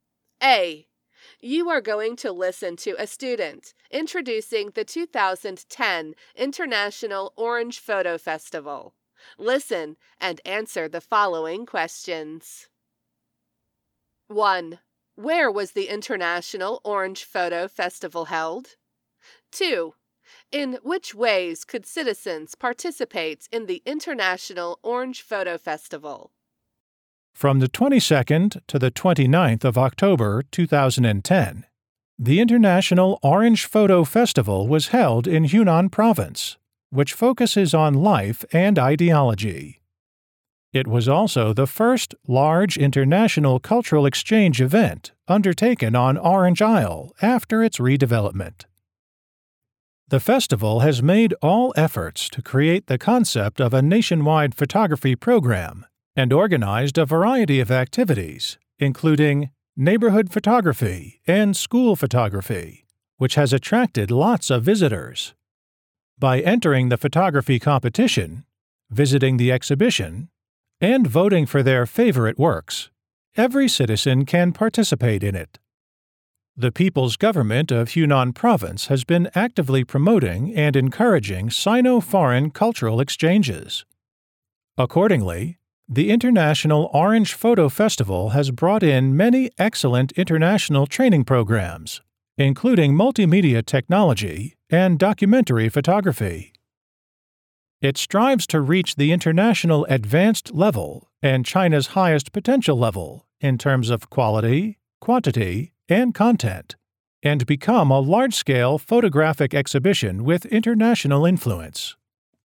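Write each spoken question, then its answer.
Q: Where was the International Orange Photo Festival held?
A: On Orange Isle in Hunan Province

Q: In which ways could citizens participate in the International Orange Photo Festival?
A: By entering the photography competition, visiting the exhibition, and voting for their favorite works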